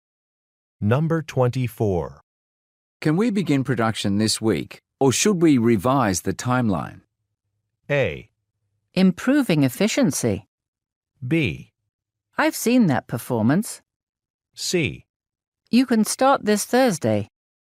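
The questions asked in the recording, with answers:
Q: Can we begin production this week, or should we revise the timeline?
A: C: You can start this Thursday.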